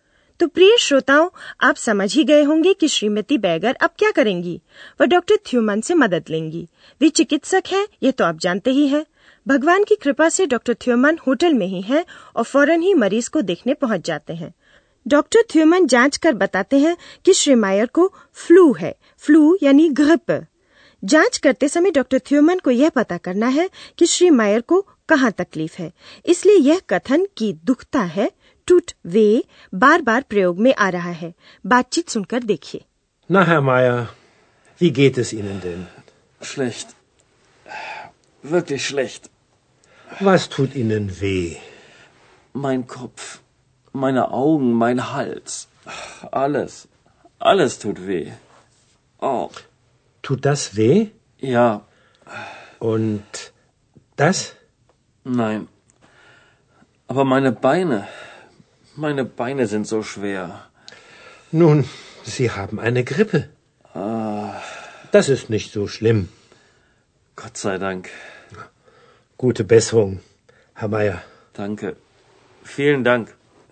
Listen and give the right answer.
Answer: श्री मायर का पूरा शरीर दुख रहा है